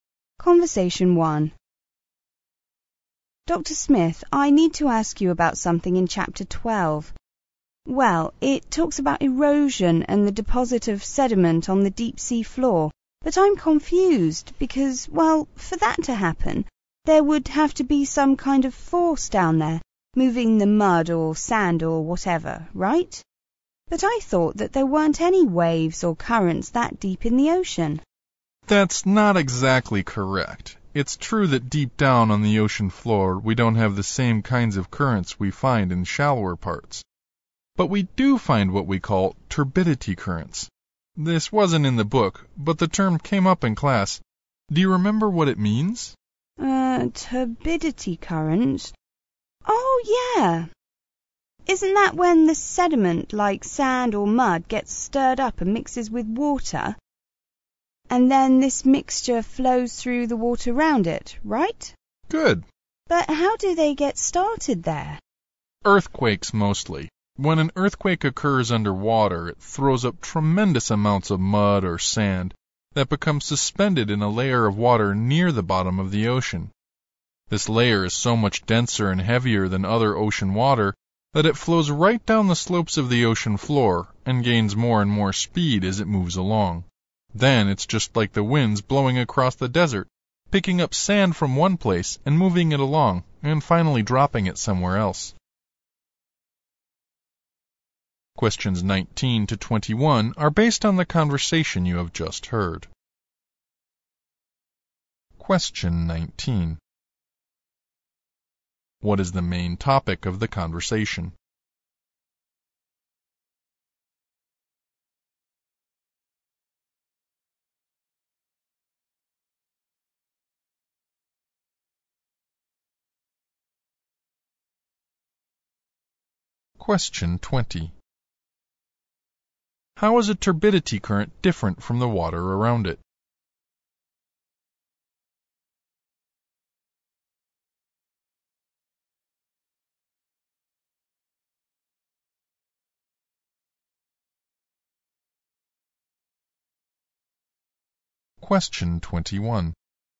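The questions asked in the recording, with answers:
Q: What is the main topic of the conversation?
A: Turbidity currents on the deep sea floor

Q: How is a turbidity current different from the water around it?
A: It is denser and heavier.

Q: Why does the professor mention desert winds?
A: To show how turbidity currents pick up sediment, move it and deposit it somewhere else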